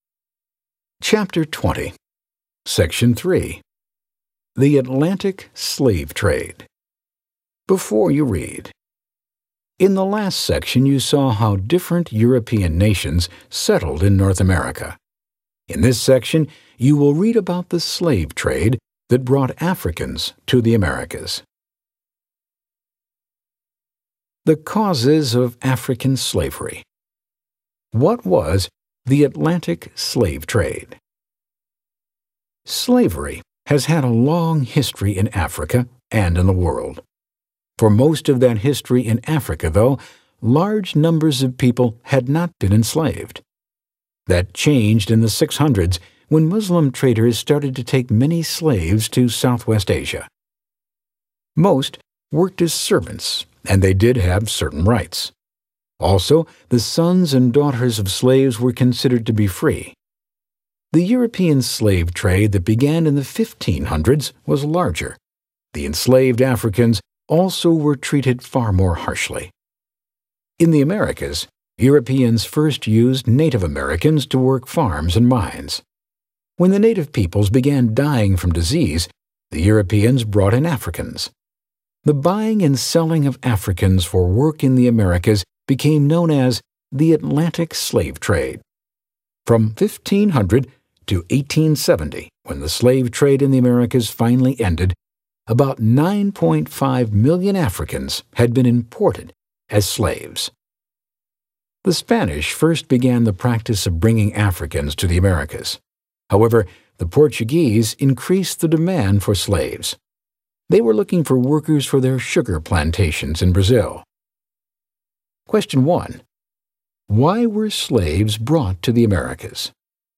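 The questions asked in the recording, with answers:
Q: Why were slaves brought to the Americas?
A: To work on farms, mines and plantations after Native Americans died from disease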